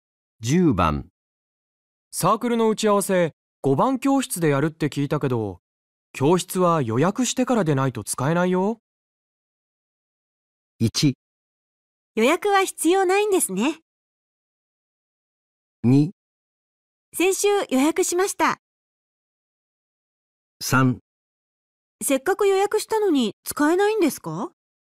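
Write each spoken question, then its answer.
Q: サークルの打ち合わせ5番教室でやるって聞いたけど教室は予約してからでないと使えないよ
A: 2: 先週予約しました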